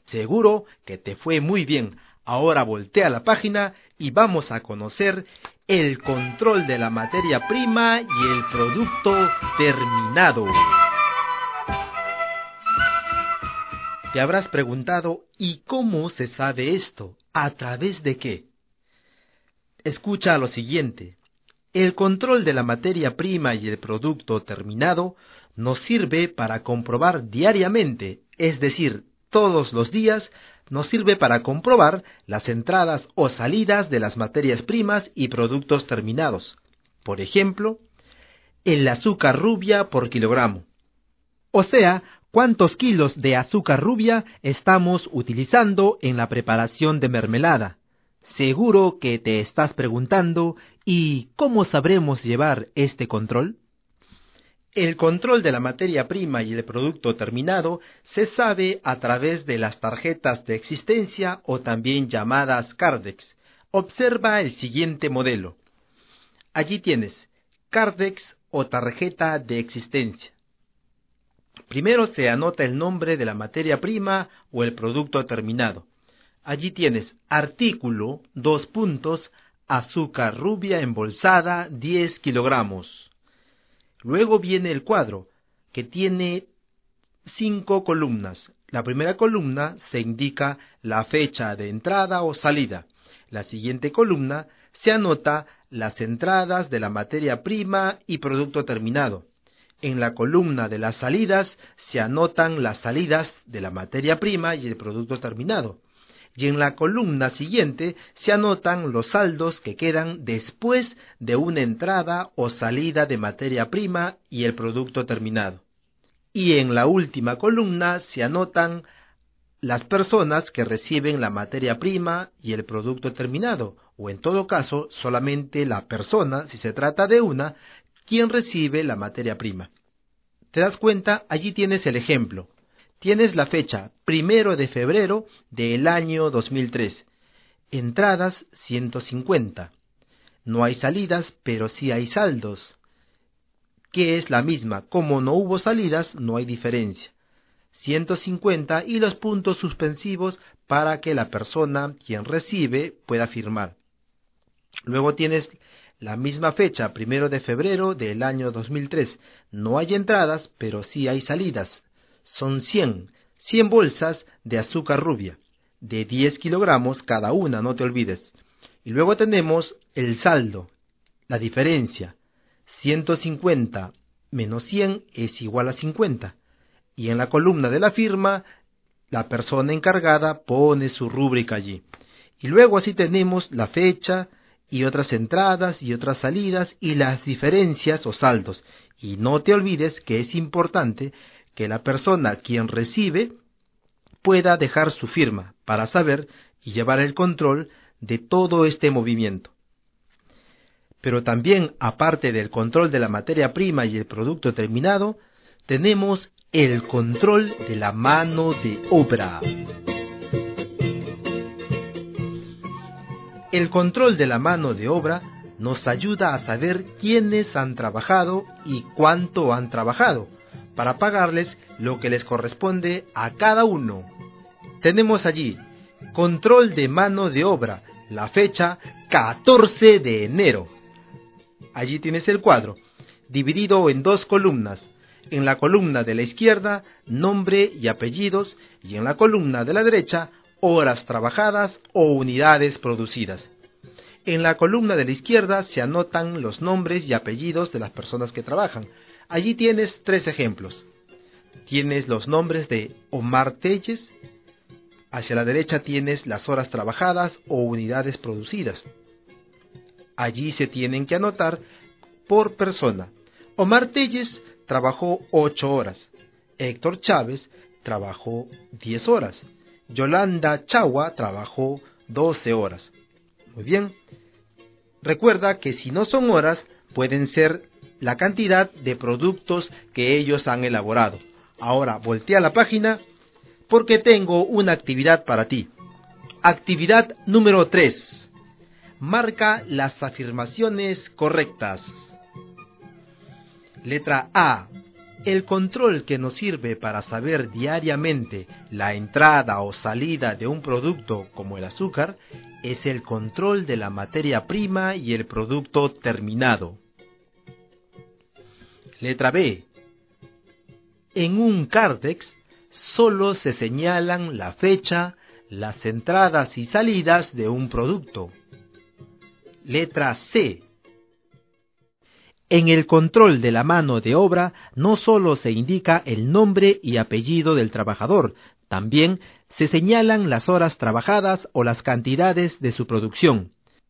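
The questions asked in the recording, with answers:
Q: Letra A. El control que nos sirve para saber diariamente la entrada o salida de un producto como el azúcar es el control de la materia prima y el producto terminado.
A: Correcta

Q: Letra B. En un cárdex solo se señalan la fecha, las entradas y salidas de un producto.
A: Incorrecta

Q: Letra C. En el control de la mano de obra no solo se indica el nombre y apellido del trabajador, también se señalan las horas trabajadas o las cantidades de su producción.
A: Correcta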